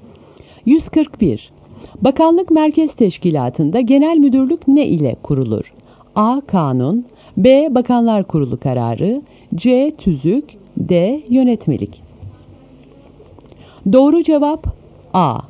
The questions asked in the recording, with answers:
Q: Bakanlık merkez teşkilatında genel müdürlük ne ile kurulur?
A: Doğru cevap A.